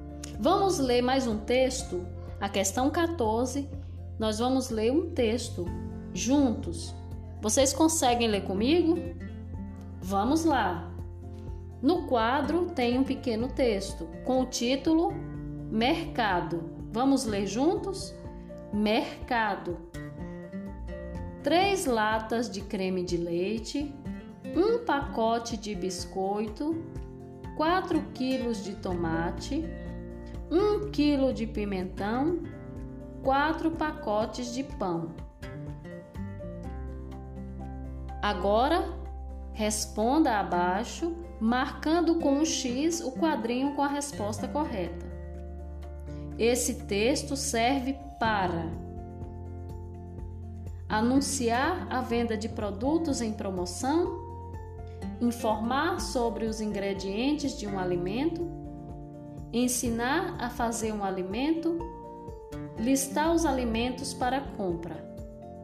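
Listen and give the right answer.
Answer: D: listar os alimentos para compra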